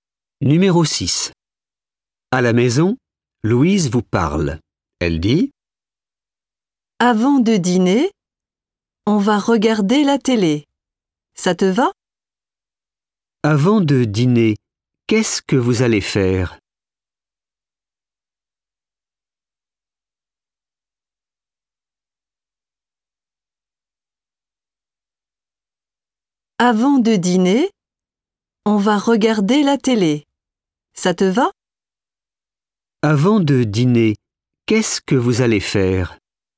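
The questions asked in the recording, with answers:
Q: Avant de dîner, qu'est-ce que vous allez faire?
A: regarder la télé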